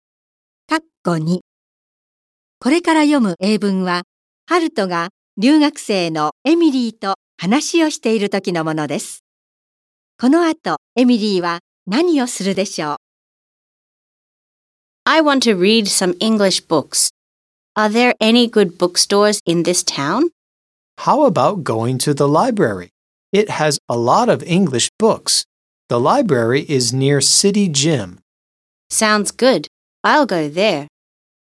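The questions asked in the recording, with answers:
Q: この後、エミリーは何をするでしょう?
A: 図書館へ行く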